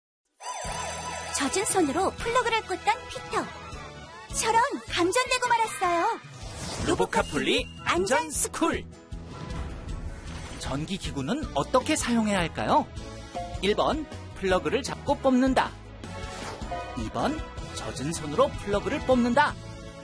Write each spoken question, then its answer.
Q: 전기 기구는 어떻게 사용해야 할까요?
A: 정답은 1번. 전선이 아닌 플러그를 단단히 잡고 뽑아야 해요.